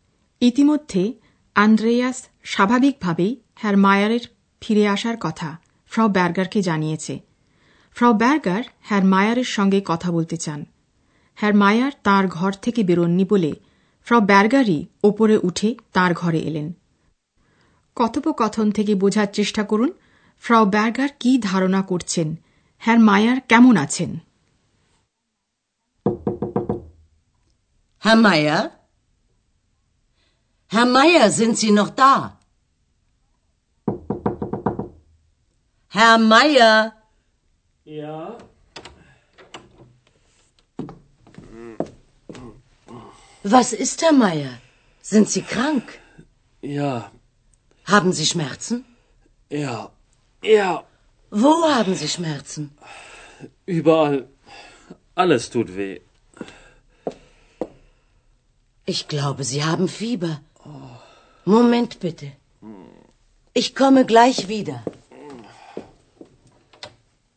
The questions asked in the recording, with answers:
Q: কথোপকথন থেকে বোঝার চেষ্টা করুন ফ্র Berger কি ধারণা করছেন হ্যার মায়ার কেমন আছেন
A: হ্যার মায়ার ভালো নেই তিনি অসুস্থ